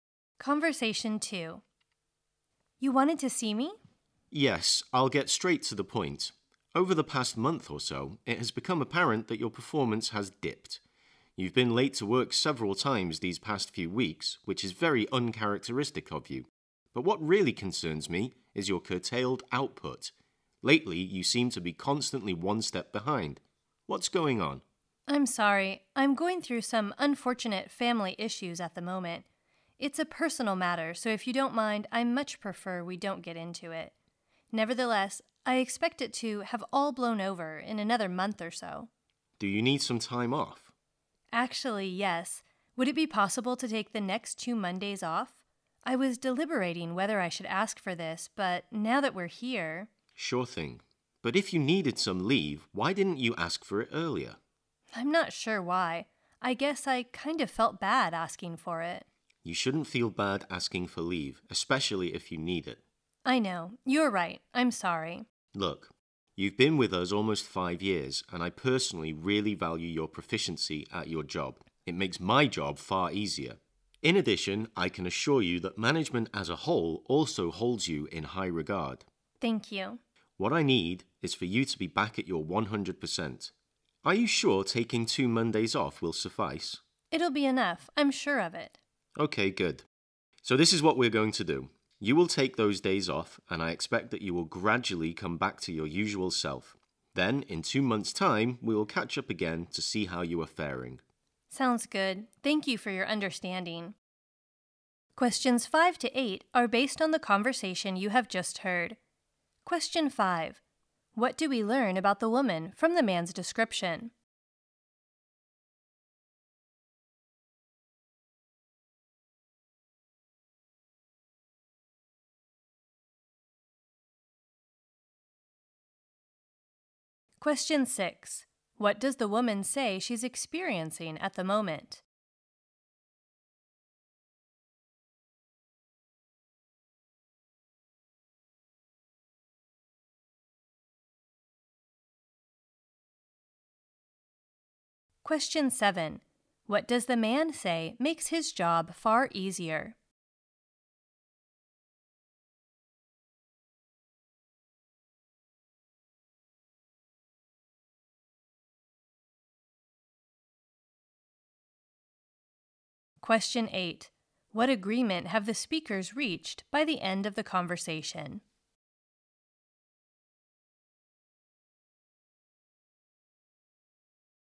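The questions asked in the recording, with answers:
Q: What do we learn about the woman from the man's description?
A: Her performance has dipped: she has been late several times and her output has fallen

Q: What does the woman say she's experiencing at the moment?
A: Some unfortunate family issues

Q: What does the man say makes his job far easier?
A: Her proficiency at her job

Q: What agreement have the speakers reached by the end of the conversation?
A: She will take the next two Mondays off, and they will catch up again in two months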